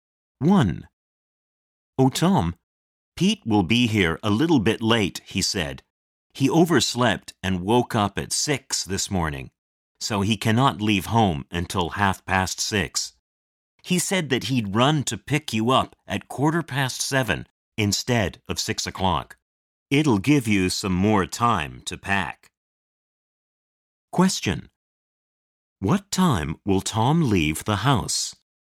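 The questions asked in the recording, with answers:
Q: What time will Tom leave the house?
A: At 7:15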